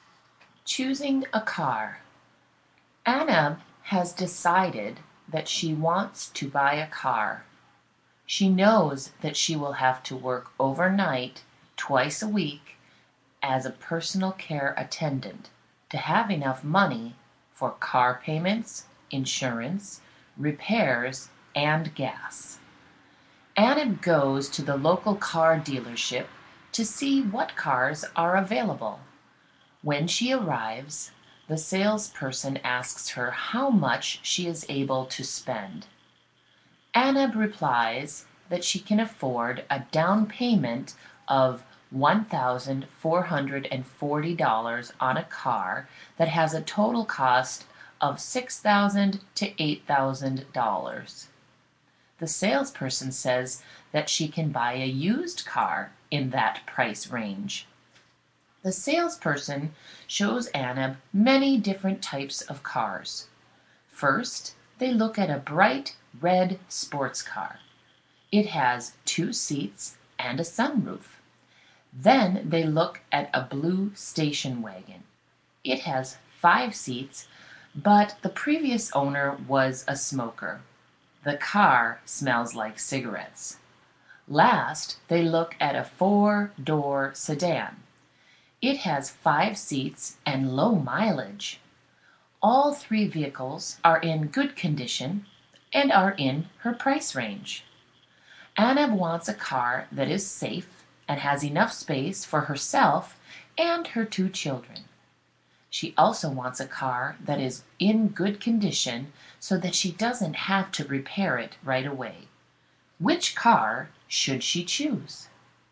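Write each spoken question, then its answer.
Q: Which car should she choose?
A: The four-door sedan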